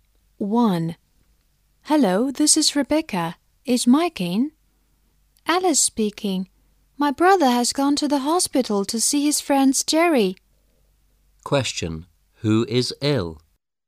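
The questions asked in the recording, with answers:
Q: Who is ill?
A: Jerry, Mike's friend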